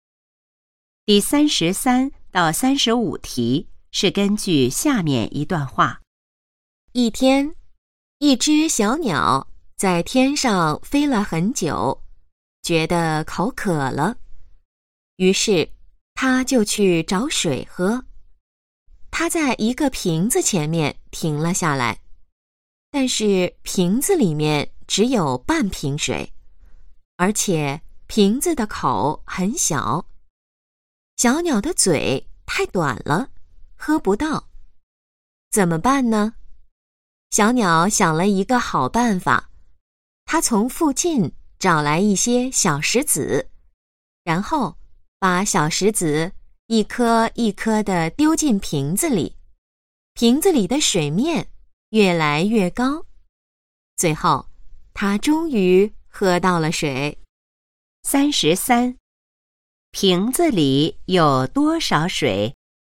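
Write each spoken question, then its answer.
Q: 瓶子里有多少水?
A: 半瓶水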